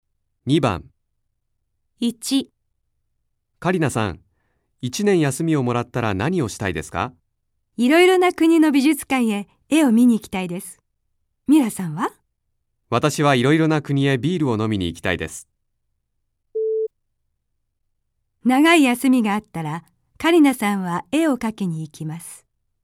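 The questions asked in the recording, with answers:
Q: 長い休みがあったらカリナさんは絵を描きに行きます。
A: ×(絵を見に行きたい)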